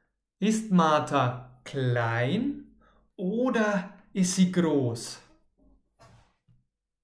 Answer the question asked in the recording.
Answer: Klein. Martha ist klein.